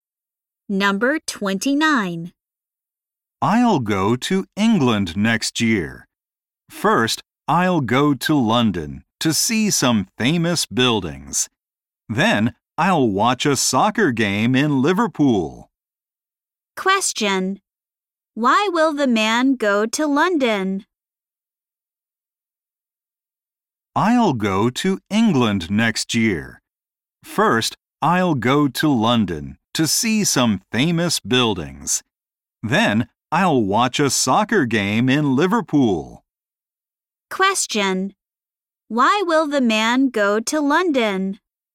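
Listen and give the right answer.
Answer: To see some famous buildings.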